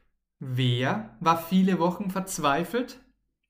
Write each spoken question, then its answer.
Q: Wer war viele Wochen verzweifelt?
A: Thomas natürlich, unser Freund Thomas.